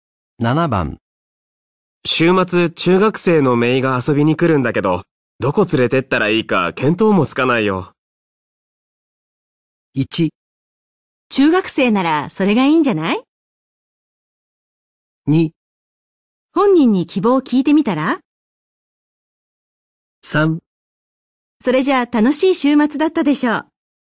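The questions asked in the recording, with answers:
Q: 週末、中学生のメイが遊びに来るんだけど、どこ連れてったらいいか見当もつかないよ。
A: 2: 本人に希望を聞いてみたら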